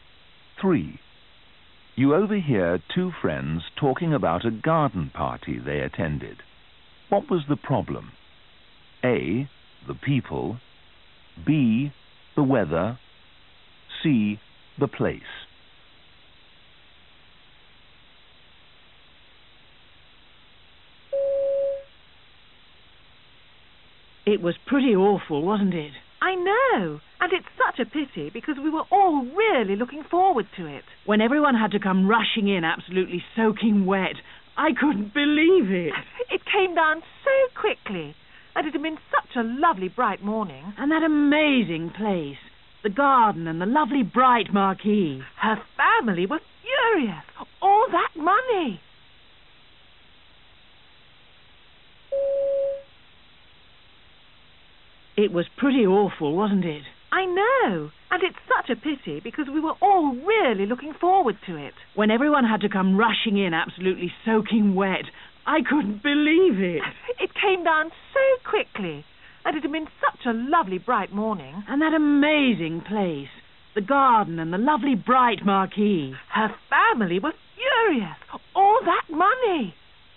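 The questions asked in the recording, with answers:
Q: What was the problem?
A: B: The weather.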